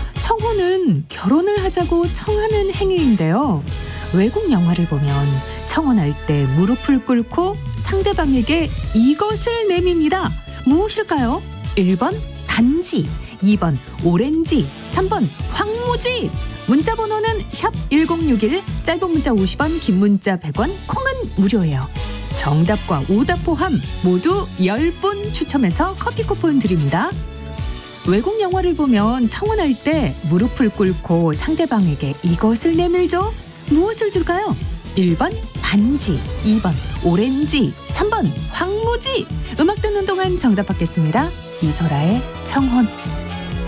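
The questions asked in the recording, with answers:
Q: 무엇을 줄까요?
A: 1번: 반지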